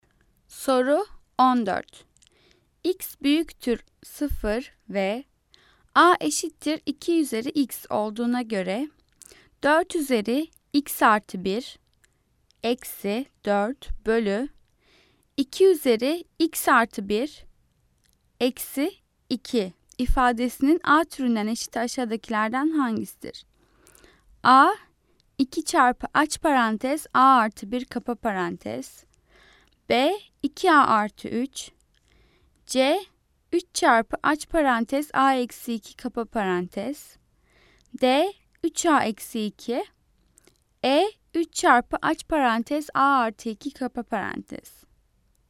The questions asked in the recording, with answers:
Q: X büyüktür 0 ve A eşittir 2 üzeri X olduğuna göre 4 üzeri X artı 1 eksi 4 bölü 2 üzeri X artı 1 eksi 2 ifadesinin A türünden eşit aşağıdakilerden hangisidir?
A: Cevap A 2 çarpı aç parantez A artı 1 kapa parantez.